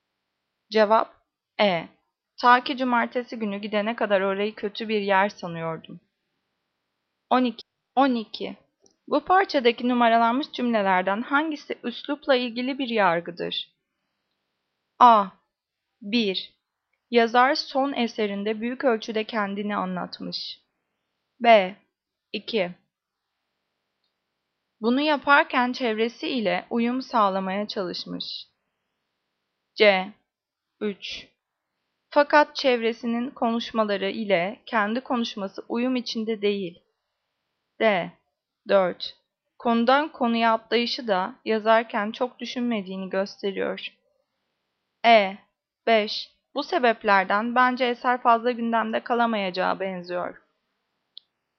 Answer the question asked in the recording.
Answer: Cevap C. 3. Fakat çevresinin konuşmaları ile kendi konuşması uyum içinde değil.